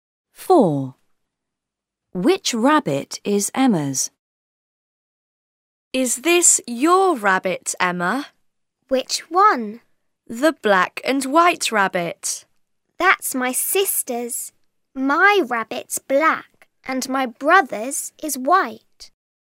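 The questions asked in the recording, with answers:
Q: Which rabbit is Emma's?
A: the black one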